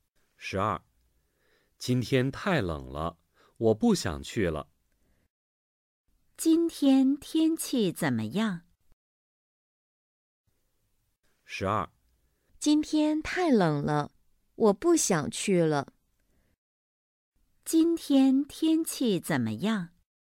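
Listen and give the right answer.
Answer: 太冷了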